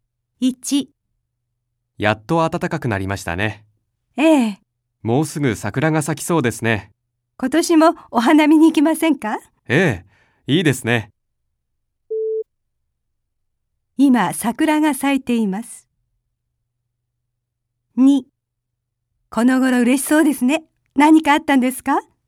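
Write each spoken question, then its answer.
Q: 今桜が咲いています。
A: ×(まだ咲いていない)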